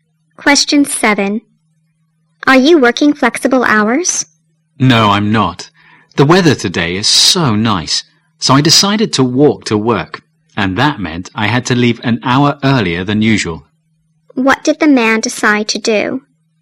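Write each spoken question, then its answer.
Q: What did the man decide to do?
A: Walk to work.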